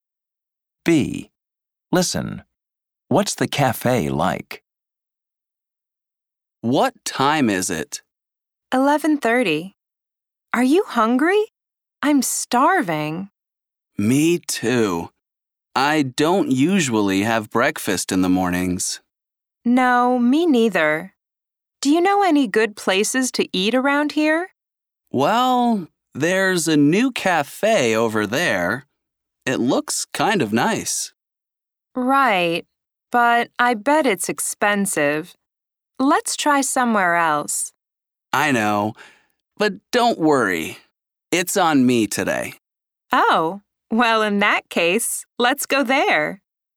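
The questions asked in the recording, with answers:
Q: What's the cafe like?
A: It's new and looks kind of nice, but it's probably expensive.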